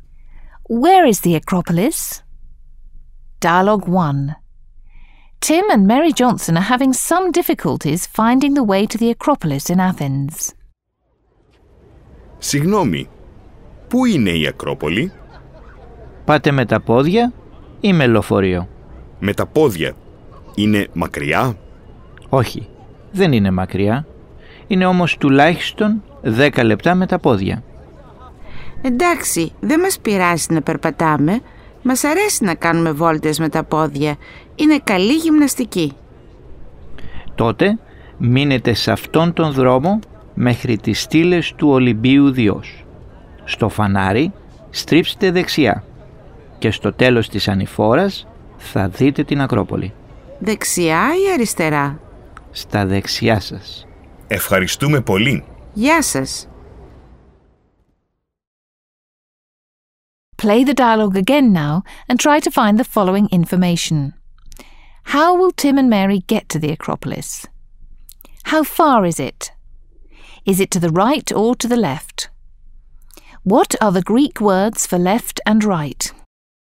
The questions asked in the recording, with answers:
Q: How will Tim and Mary get to the Acropolis?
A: They will go on foot.

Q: How far is it?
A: The Acropolis is only 10 minutes away

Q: Is it to the right or to the left?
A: on the right.

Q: What are the Greek words for left and right?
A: The Greek words for left and right are αριστερά and δεξιά.